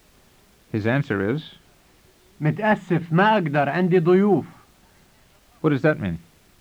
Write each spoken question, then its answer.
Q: What does that mean?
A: It means, sorry, I can't, I have guests.